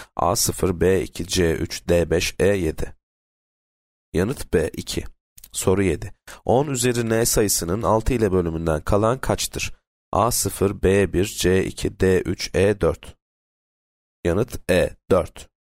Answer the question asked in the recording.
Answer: Yanıt E 4.